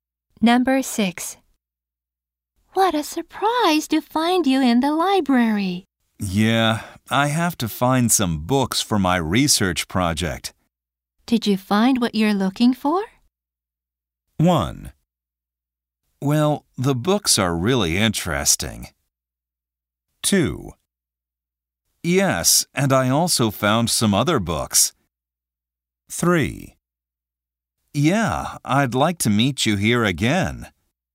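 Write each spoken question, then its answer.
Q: Did you find what you're looking for?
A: 2: Yes, and I also found some other books.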